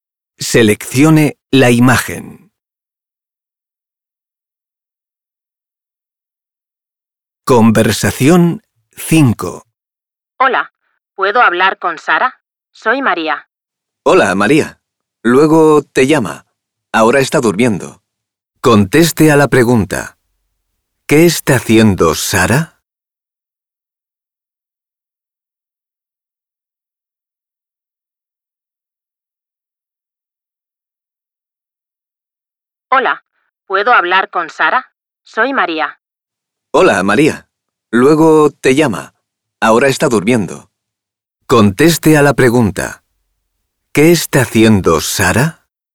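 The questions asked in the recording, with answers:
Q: ¿Qué está haciendo Sara?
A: Está durmiendo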